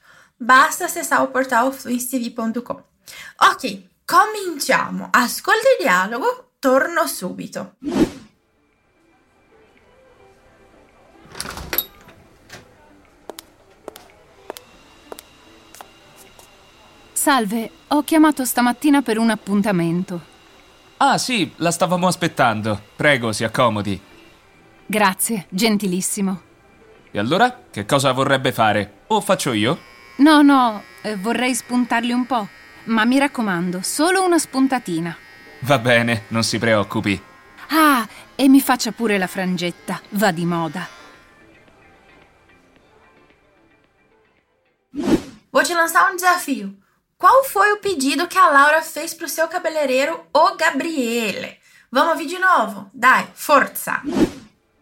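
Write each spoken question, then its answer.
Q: Qual foi o pedido que a Laura fez pro seu cabeleireiro, o Gabriele?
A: Cortar só um pouco as pontas e fazer uma franjinha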